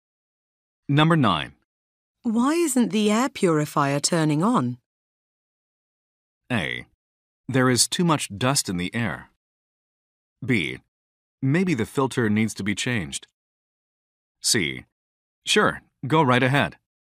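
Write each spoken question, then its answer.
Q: Why isn't the air purifier turning on?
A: B: Maybe the filter needs to be changed.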